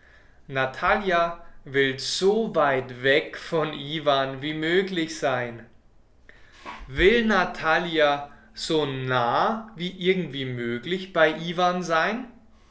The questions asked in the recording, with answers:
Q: Will Natalia so nah wie irgendwie möglich bei Ivan sein?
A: Nein, das will Natalia nicht.